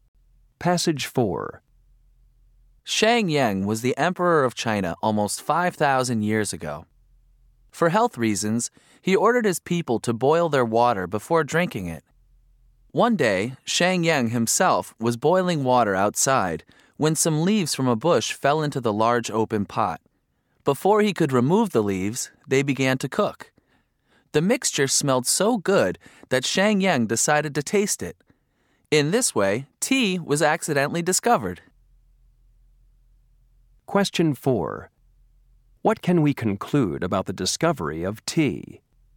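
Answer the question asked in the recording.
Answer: It was discovered by accident, when leaves fell into Shang Yang's boiling water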